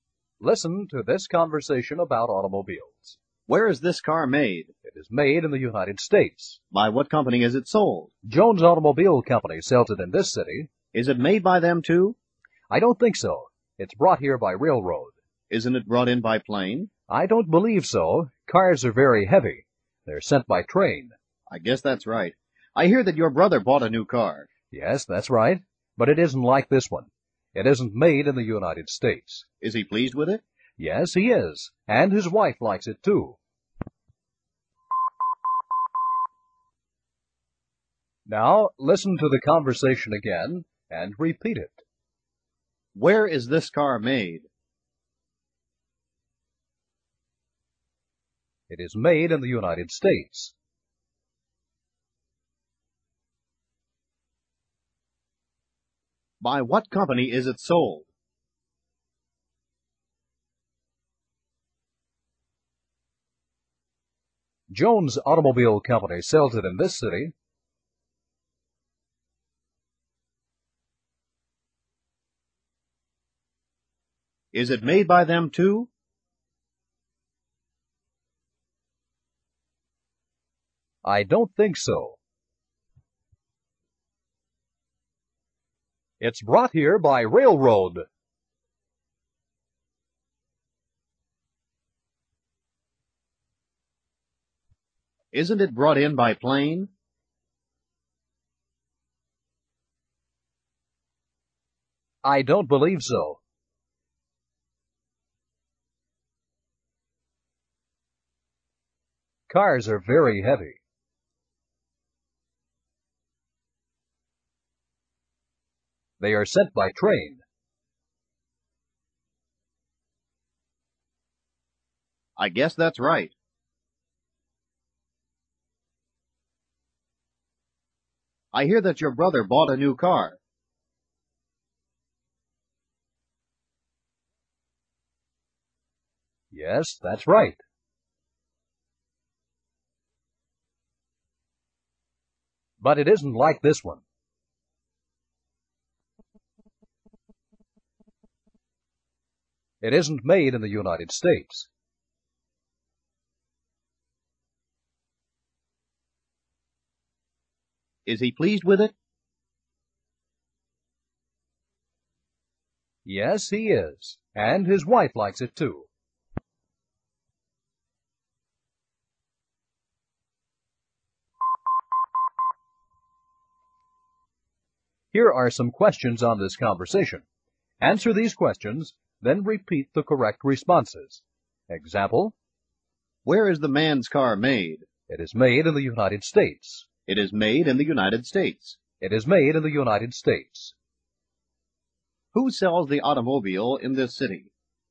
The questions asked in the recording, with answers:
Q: Who sells the automobile in this city?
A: Jones Automobile Company sells it here.